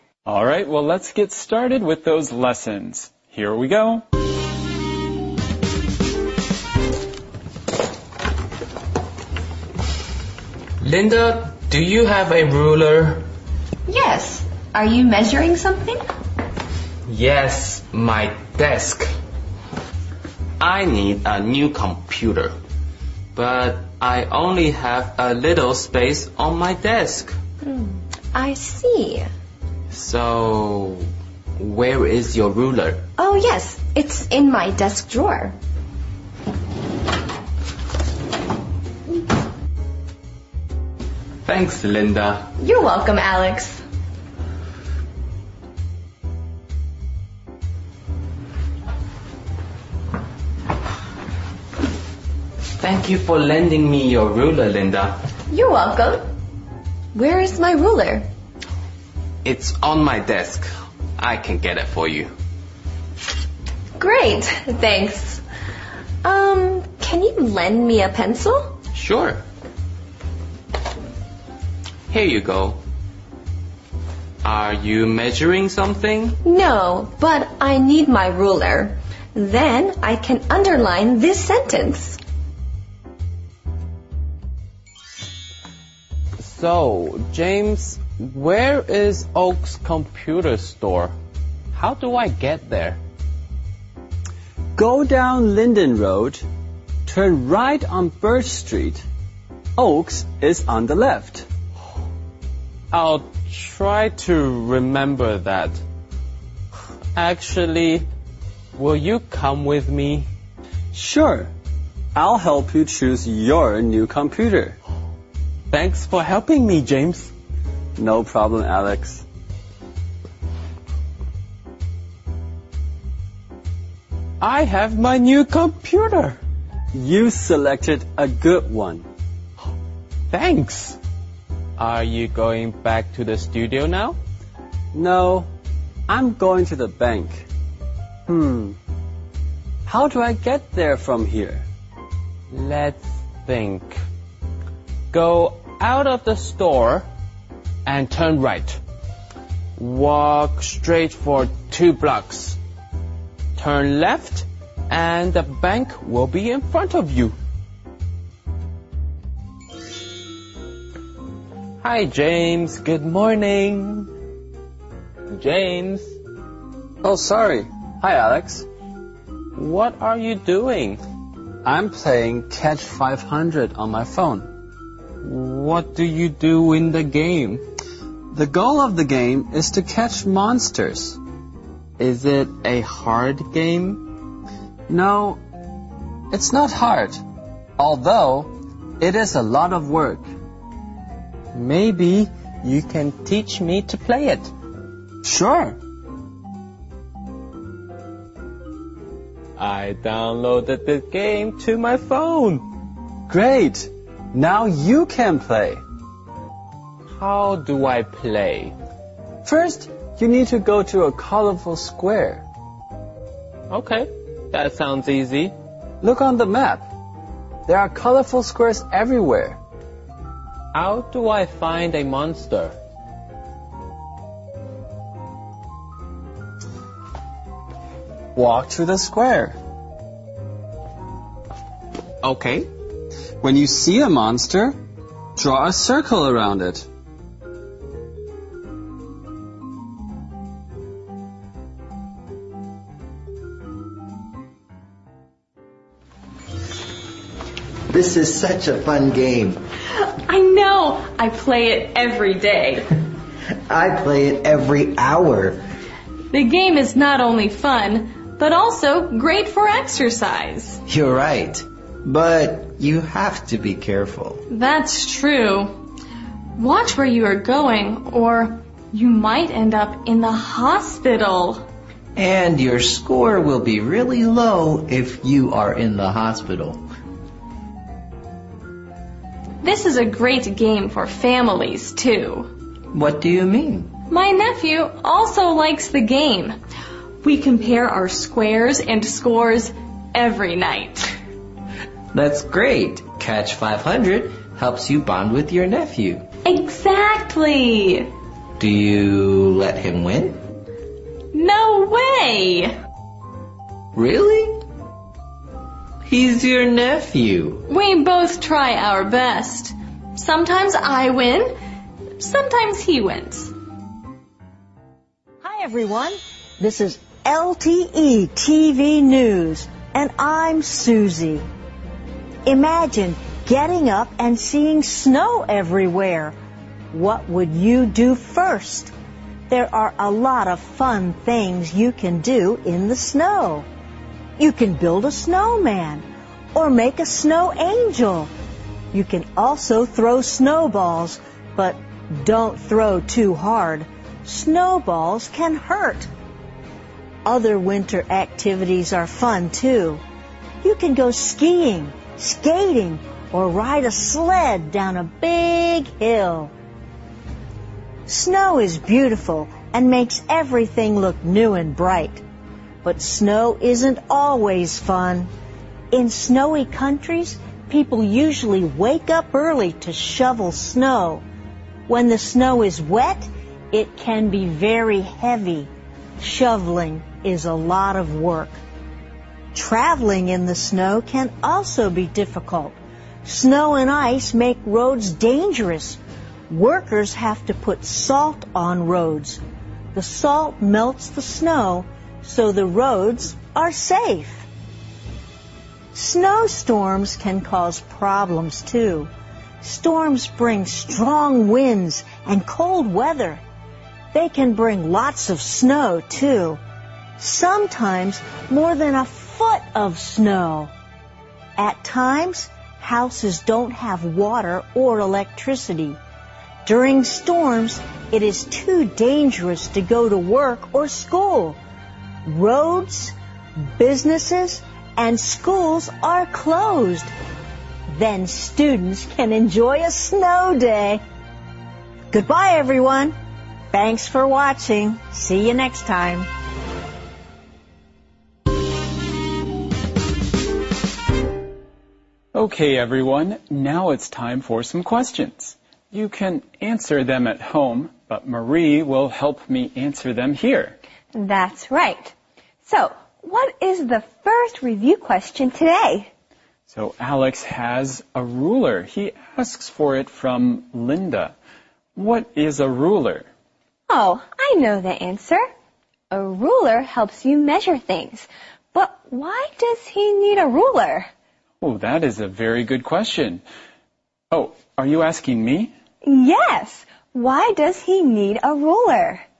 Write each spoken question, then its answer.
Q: Why does he need a ruler?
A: Well, he needs a new computer. But he only has a little space on his desk.